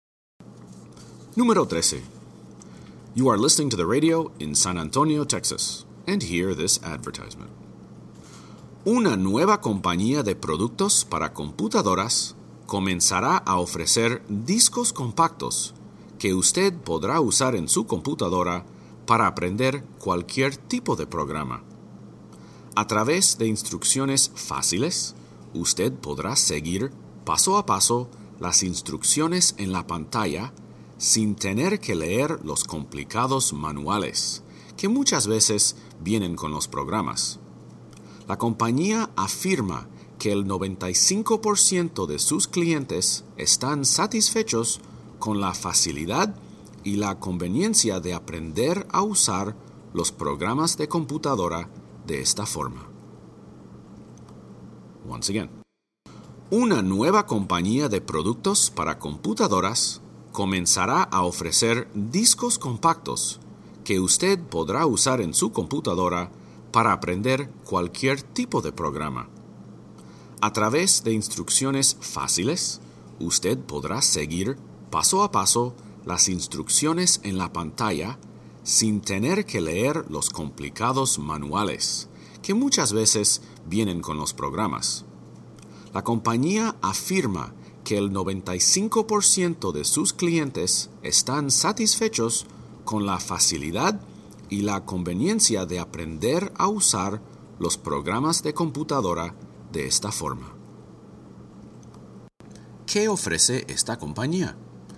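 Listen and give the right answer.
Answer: Discos compactos para aprender a usar programas de computadora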